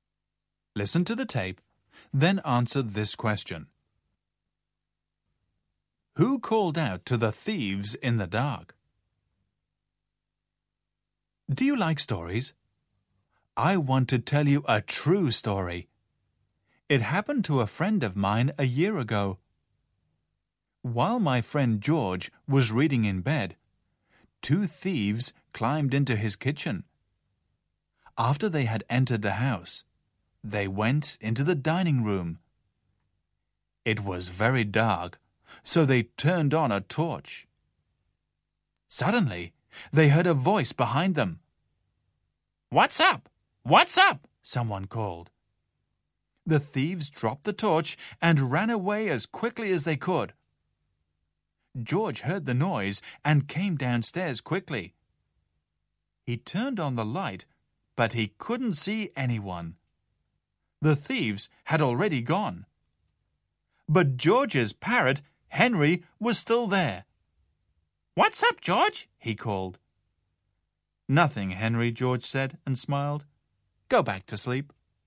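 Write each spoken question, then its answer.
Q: Who called out to the thieves in the dark?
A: George's parrot, Henry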